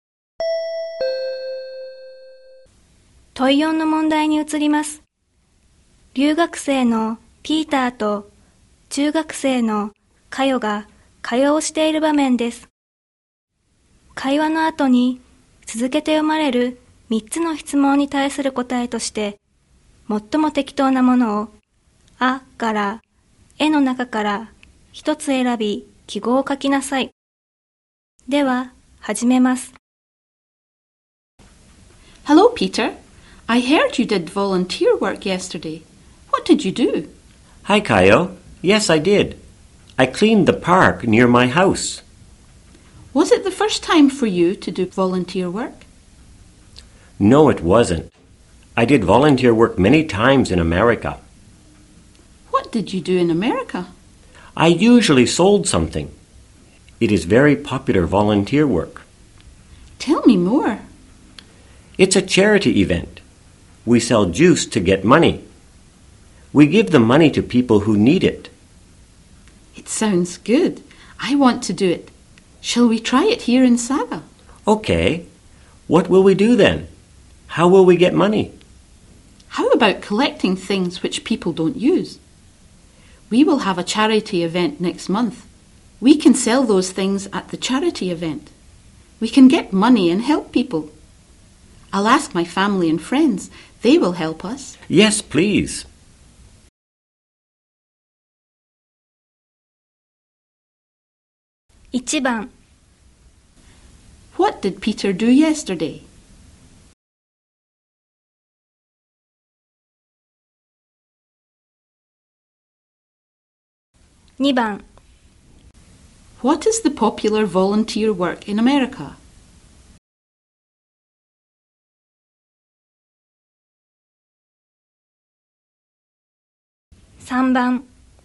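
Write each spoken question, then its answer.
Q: What did Peter do yesterday?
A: He cleaned the park near his house.

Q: What is the popular volunteer work in America?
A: Selling things, such as juice, at a charity event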